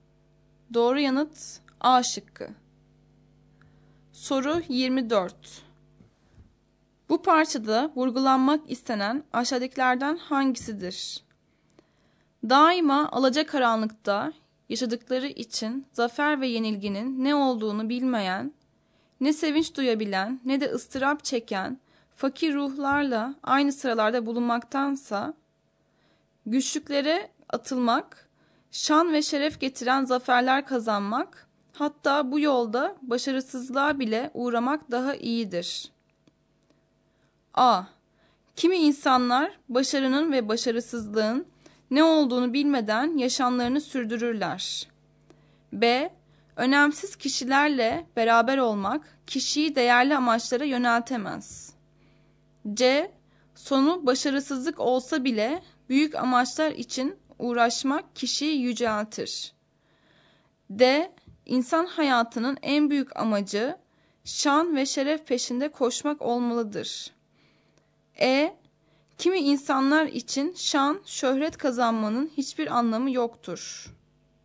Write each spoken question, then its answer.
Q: Bu parçada vurgulanmak istenen aşağıdakilerden hangisidir?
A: Doğru yanıt C şıkkı.